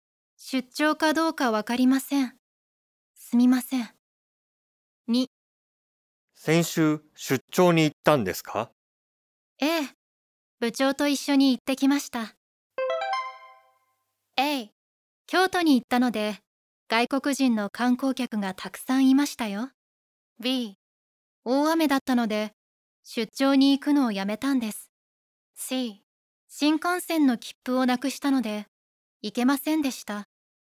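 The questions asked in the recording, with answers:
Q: 先週出張に行ったんですか?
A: A: 京都に行ったので外国人の観光客がたくさんいましたよ。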